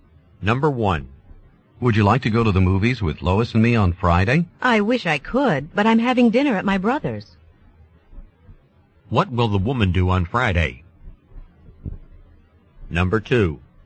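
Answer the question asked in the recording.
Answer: Have dinner at her brother's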